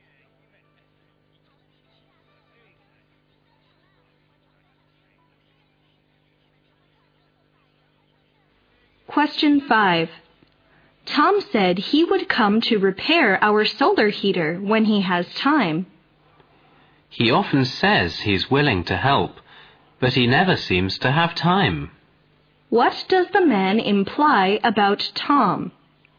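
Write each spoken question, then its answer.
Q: What does the man imply about Tom?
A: Tom says he will help but never actually finds time to do it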